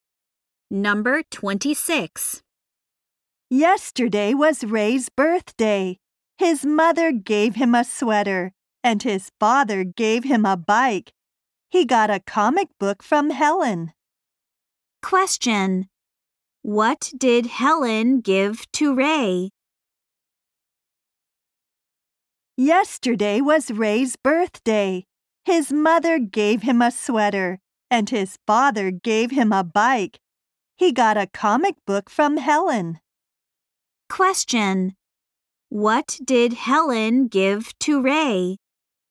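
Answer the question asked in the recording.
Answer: A comic book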